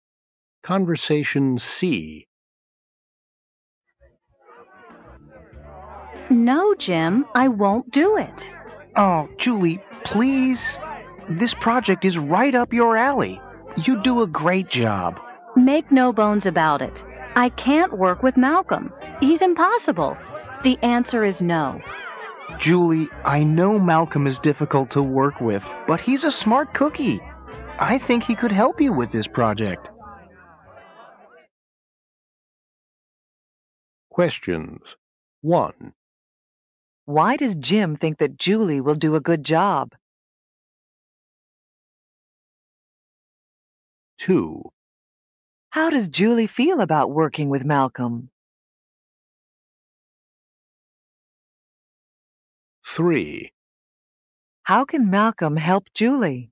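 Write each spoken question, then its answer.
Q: Why does Jim think that Julie will do a good job?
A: The project is right up her alley.

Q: How does Julie feel about working with Malcolm?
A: She refuses; she can't work with him.

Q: How can Malcolm help Julie?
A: He is smart and could help with the project.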